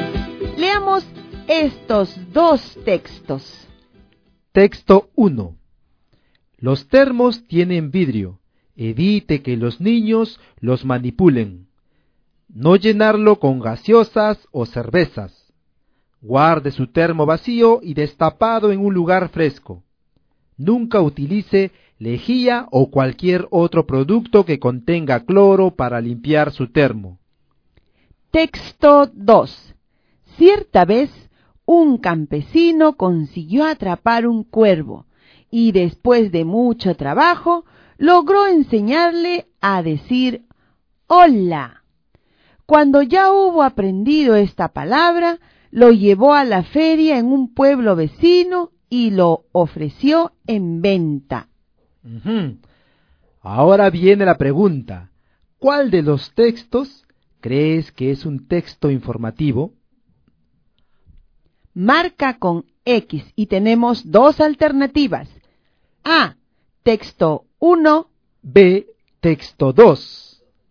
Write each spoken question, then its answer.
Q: ¿cuál de los textos crees que es un texto informativo?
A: He vuelto a la página 1 y la opción que marqué fue la letra A.